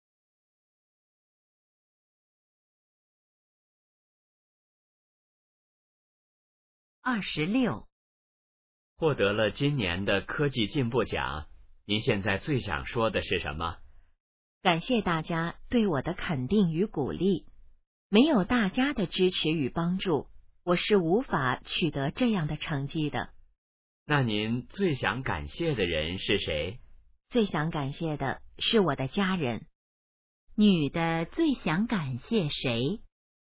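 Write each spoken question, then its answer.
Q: 女的最想感谢谁?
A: 她的家人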